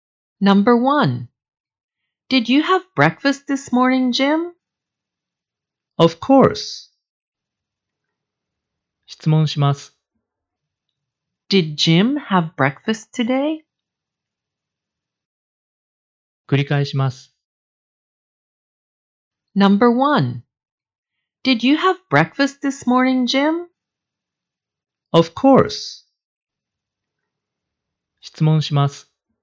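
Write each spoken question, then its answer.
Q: Did Jim have breakfast today?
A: Yes, he did.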